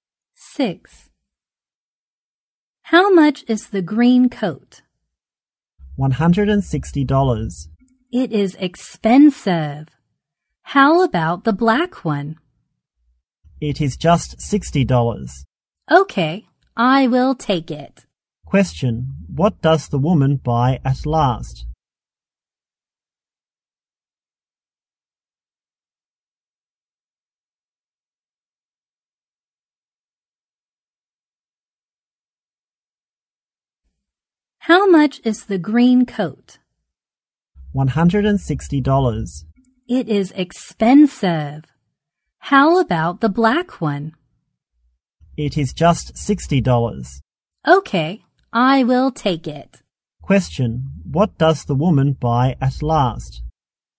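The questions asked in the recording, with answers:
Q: Question: What does the woman buy at last?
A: The black coat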